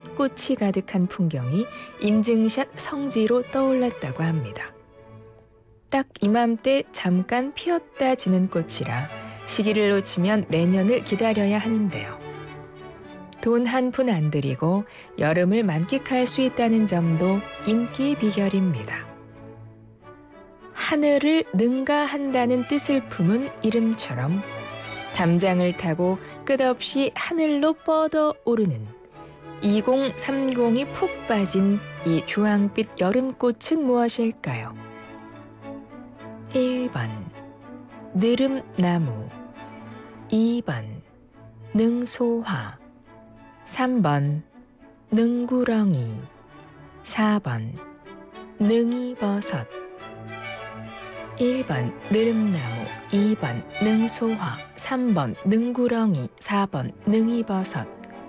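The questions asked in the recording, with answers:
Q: 하늘을 능가한다는 뜻을 품은 이름처럼 담장을 타고 끝없이 하늘로 뻗어 오르는 2030이 푹 빠진 이 주황빛 여름꽃은 무엇일까요?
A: 2번: 능소화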